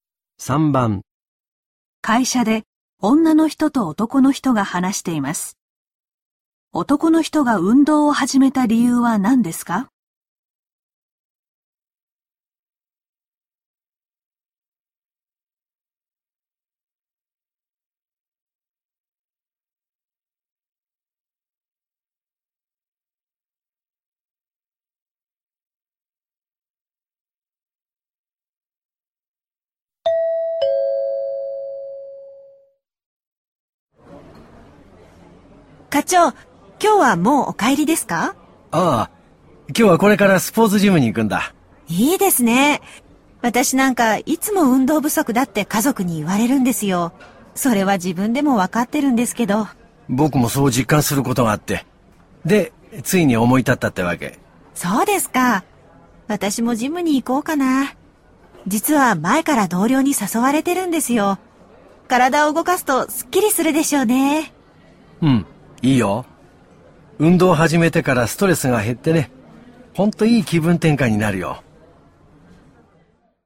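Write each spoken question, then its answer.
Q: 男の人が運動を始めた理由は何ですか?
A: 自分でも運動不足を実感したから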